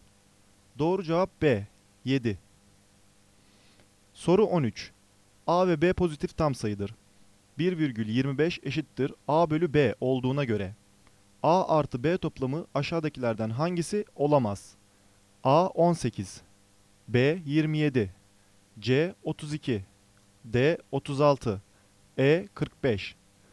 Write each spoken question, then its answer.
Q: 1,25 eşittir A bölü B olduğuna göre A artı B toplamı aşağıdakilerden hangisi olamaz?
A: Doğru cevap C, 32.